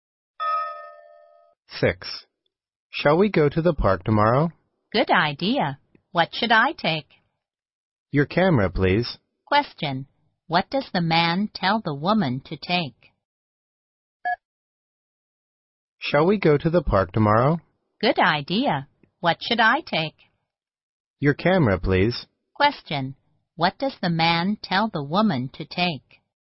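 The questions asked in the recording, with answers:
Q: What does the man tell the woman to take?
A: Her camera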